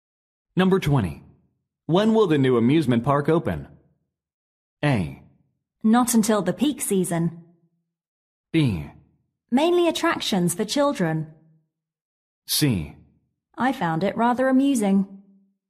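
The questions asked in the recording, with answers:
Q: When will the new amusement park open?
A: A: Not until the peak season.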